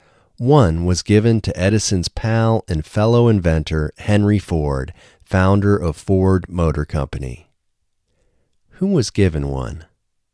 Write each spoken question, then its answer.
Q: Who was given one?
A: Edison's pal and fellow inventor, Henry Ford, was given one.